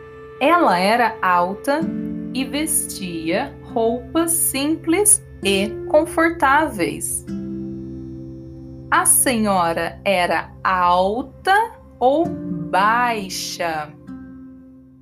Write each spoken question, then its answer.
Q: A senhora era alta ou baixa?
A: Alta. A senhora era alta.